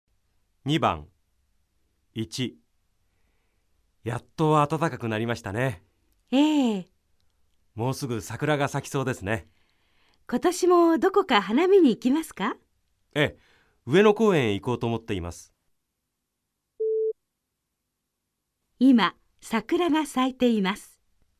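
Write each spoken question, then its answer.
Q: 今、桜が咲いています。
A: ×(まだ咲いていない)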